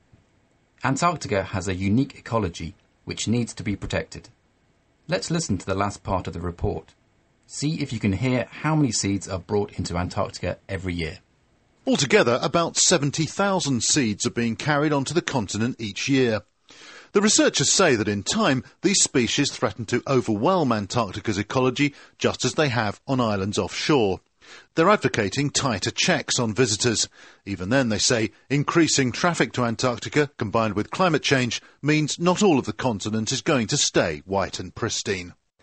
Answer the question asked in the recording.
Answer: Wow, 70,000 seeds are carried into Antarctica each year.